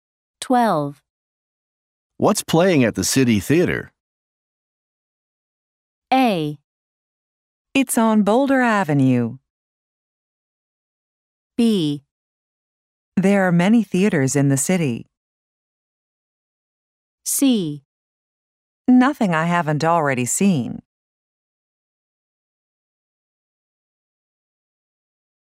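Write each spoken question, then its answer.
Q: What's playing at the City Theater?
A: C: Nothing I haven't already seen.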